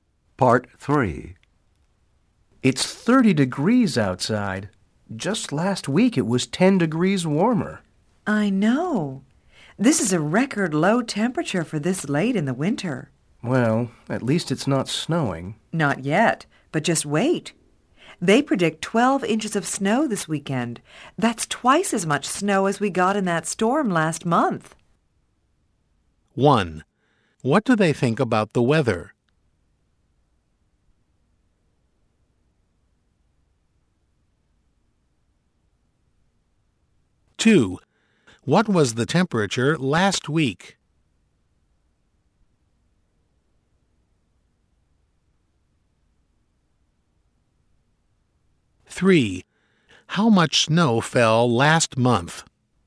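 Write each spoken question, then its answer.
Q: What was the temperature last week?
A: 40 degrees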